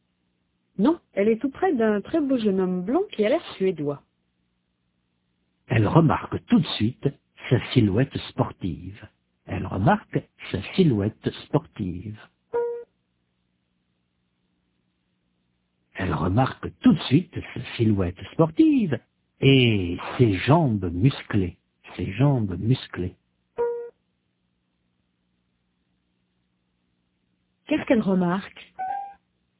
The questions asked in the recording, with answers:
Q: Qu'est-ce qu'elle remarque?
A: Sa silhouette sportive et ses jambes musclées.